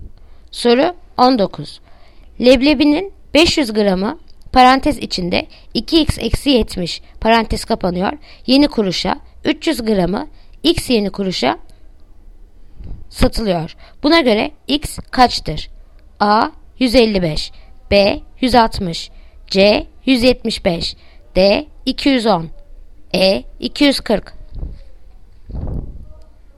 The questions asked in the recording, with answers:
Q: Buna göre x kaçtır?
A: Yanıt Diyarbakır 210